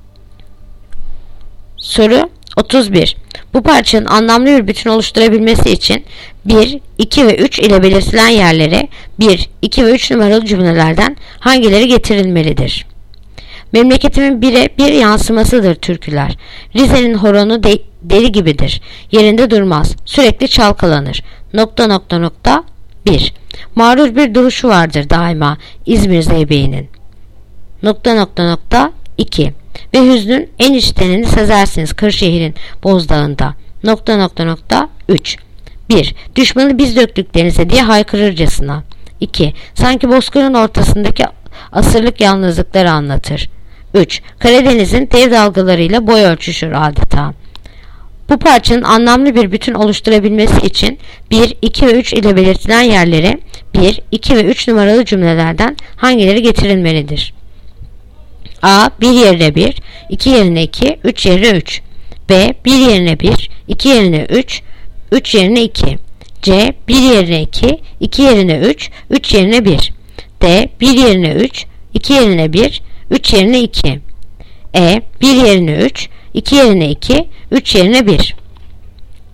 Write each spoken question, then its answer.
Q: Bu parçanın anlamlı bir bütün oluşturabilmesi için 1, 2 ve 3 ile belirtilen yerlere 1, 2 ve 3 numaralı cümlelerden hangileri getirilmelidir?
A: Yanıt: Diyarbakır. 1 yerine 3, 2 yerine 1, 3 yerine 2.